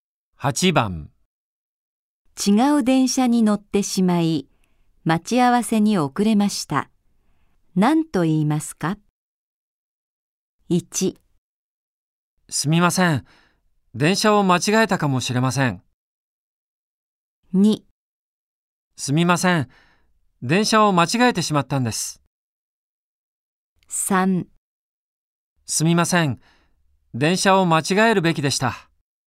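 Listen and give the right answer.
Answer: 2: すみません。電車を間違えてしまったんです。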